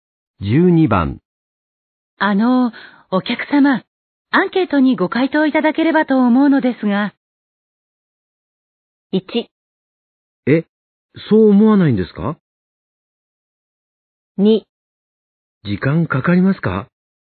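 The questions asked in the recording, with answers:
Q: あの、お客様、アンケートにご回答いただければと思うのですが。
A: 2: 時間かかりますか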